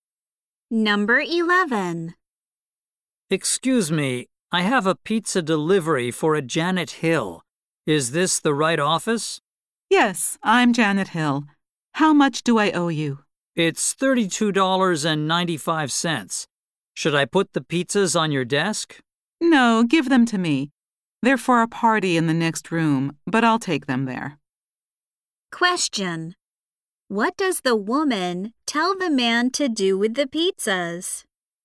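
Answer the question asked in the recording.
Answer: Give them to her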